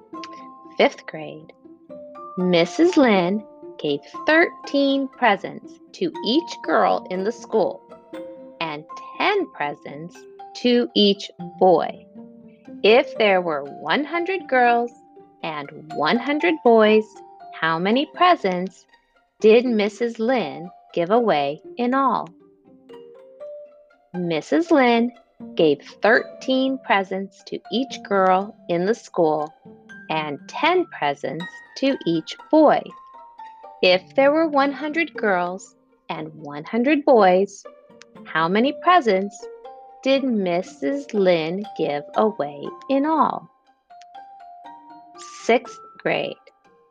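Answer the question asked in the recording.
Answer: 2,300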